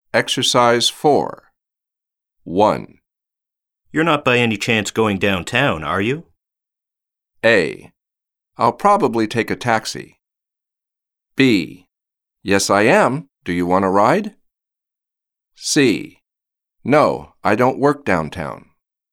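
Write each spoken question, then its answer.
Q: You're not by any chance going downtown, are you?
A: B: Yes, I am. Do you want a ride?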